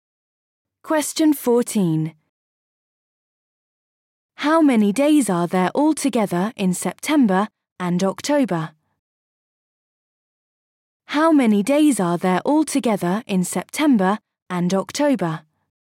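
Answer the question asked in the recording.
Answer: 61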